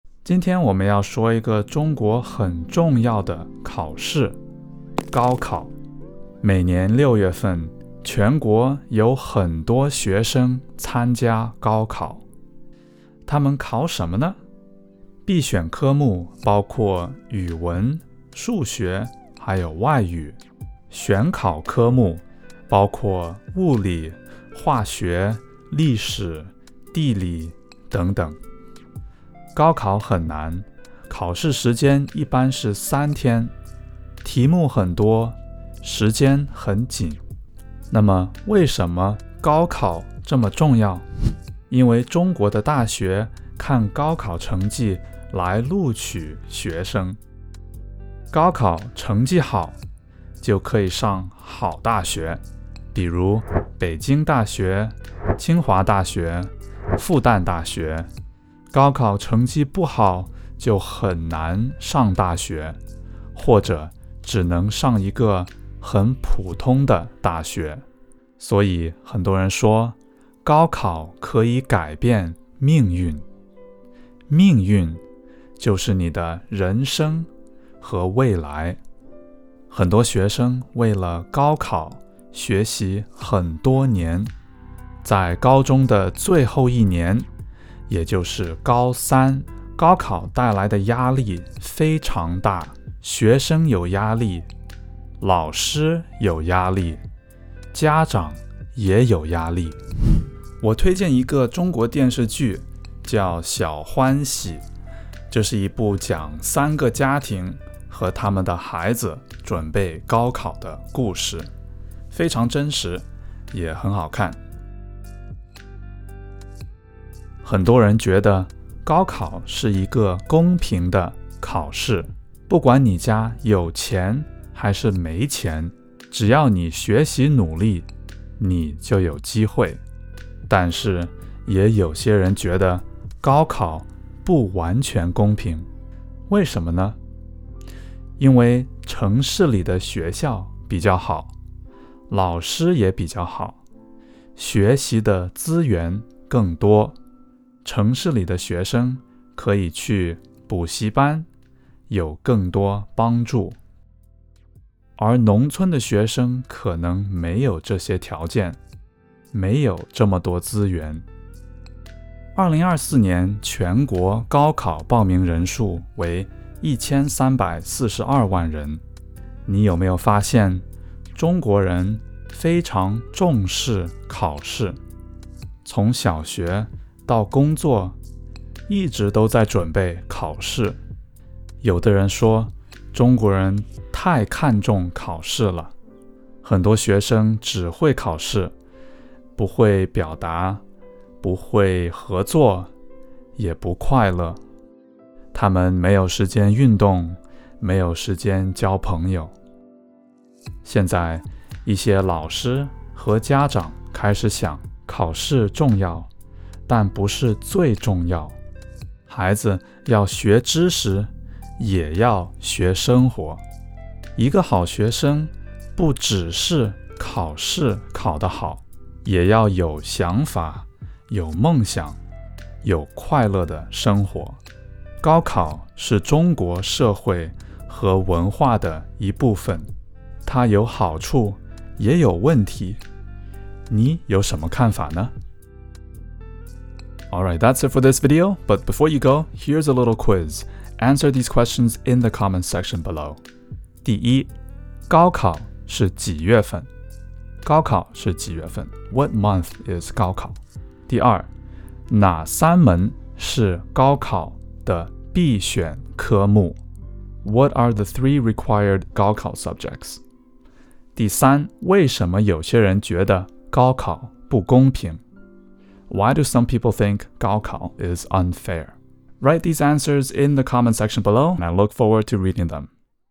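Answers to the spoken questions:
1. 六月份
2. 语文、数学和外语
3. 城市里的学校和老师比较好,学习资源更多,还能上补习班;农村学生没有这些条件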